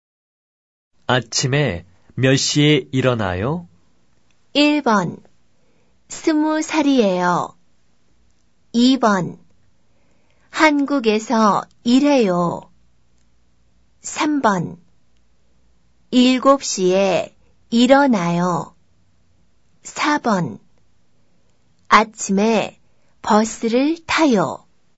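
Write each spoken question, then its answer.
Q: 아침에 몇 시에 일어나요?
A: 3: 7시에 일어나요.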